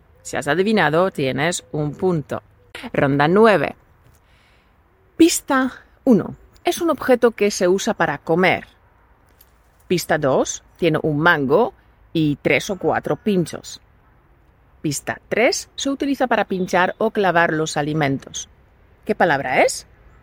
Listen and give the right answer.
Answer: ¡Felicidades! La palabra es tenedor.